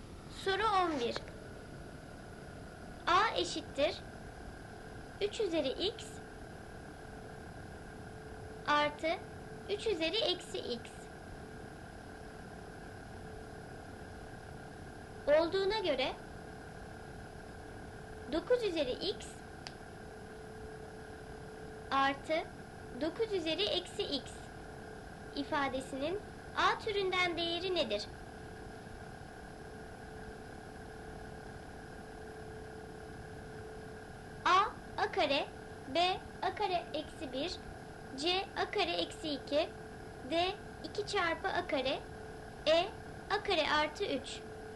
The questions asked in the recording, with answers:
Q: artı 9 üzeri eksi x ifadesinin A türünden değeri nedir?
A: Doğru cevap C a kare eksi 2.